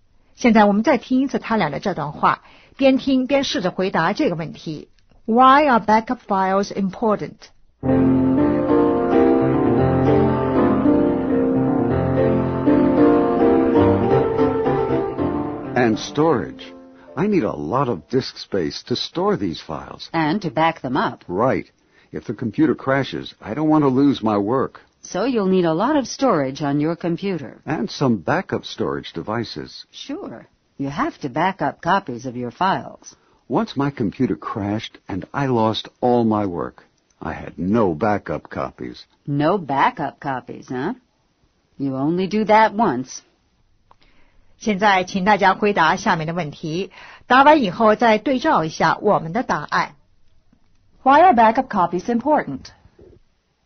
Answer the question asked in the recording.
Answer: In case you lose your files.